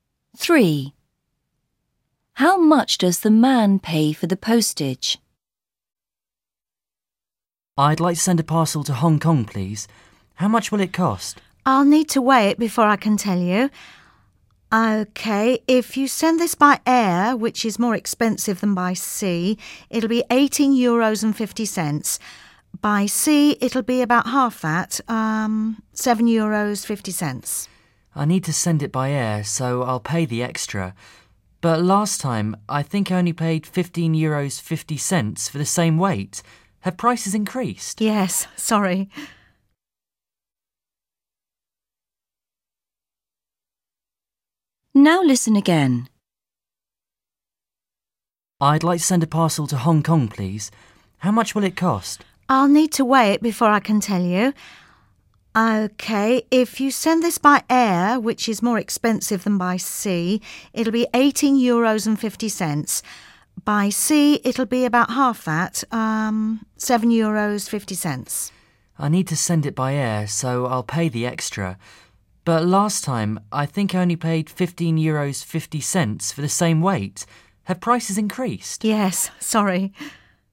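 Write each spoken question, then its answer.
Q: How much does the man pay for the postage?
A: €18.50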